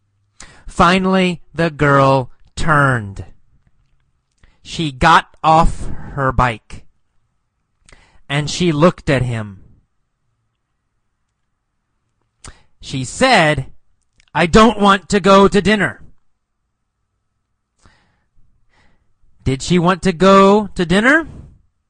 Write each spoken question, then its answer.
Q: Did she want to go to dinner?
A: No.